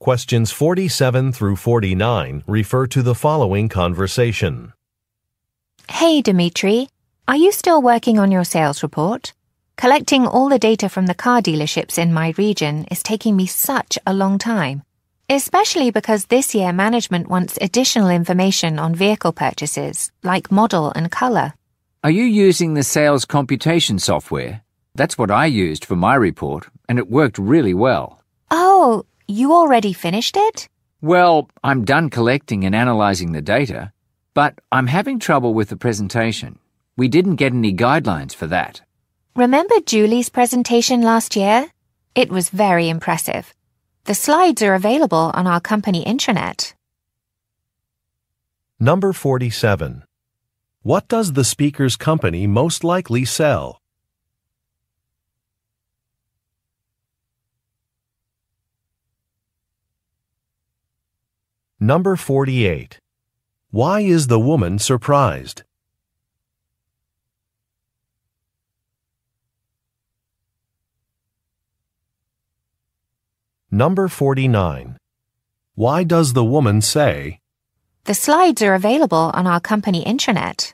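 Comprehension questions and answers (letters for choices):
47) What does the speakers' company most likely sell?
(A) Electronics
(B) Clothing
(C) Food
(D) Automobiles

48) Why is the woman surprised?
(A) Some software is expensive.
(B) A color is very bright.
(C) The man has completed a report.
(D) The man bought a new car.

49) Why does the woman say, "The slides are available on our company intranet"?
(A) To request assistance reviewing a document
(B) To recommend using a document as a reference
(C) To report that a task has been completed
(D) To indicate that a file is in the wrong location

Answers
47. D
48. C
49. B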